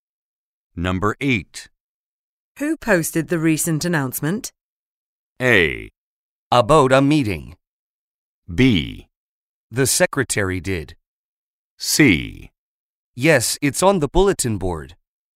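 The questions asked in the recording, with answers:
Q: Who posted the recent announcement?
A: B: The secretary did.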